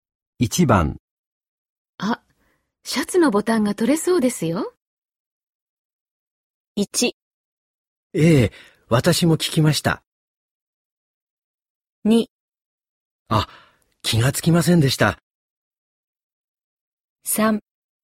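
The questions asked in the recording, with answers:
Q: あ、シャツのボタンが取れそうですよ。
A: 2: あ、気がつきませんでした。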